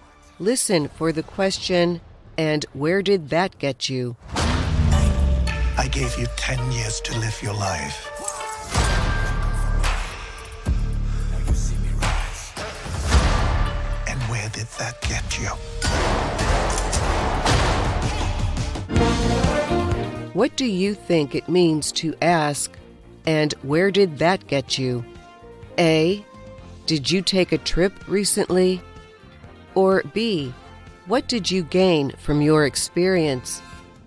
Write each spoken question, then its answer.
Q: What do you think it means to ask, and where did that get you?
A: The answer is B. And where did that get you is the same as asking, what did you gain from your experience?